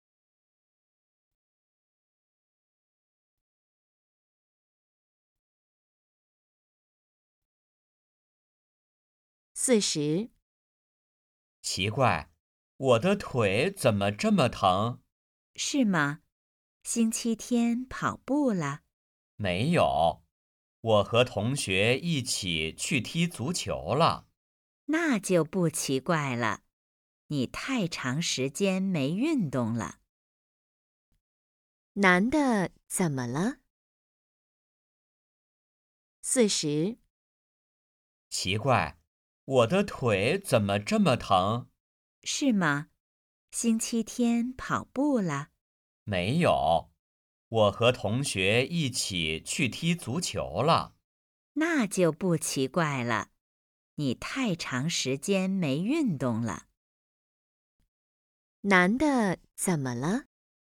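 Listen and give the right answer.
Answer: 腿疼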